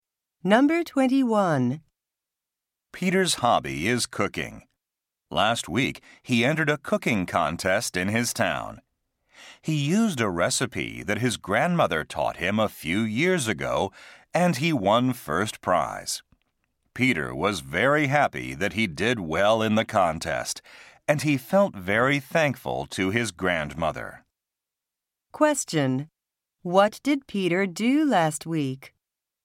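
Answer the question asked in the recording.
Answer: He entered a cooking contest and won first prize.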